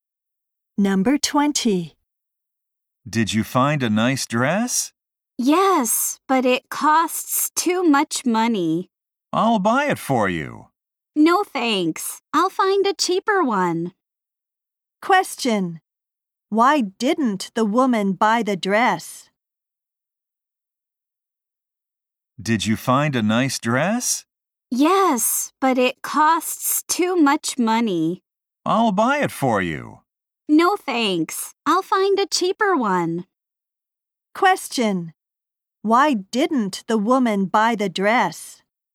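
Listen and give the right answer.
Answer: It cost too much money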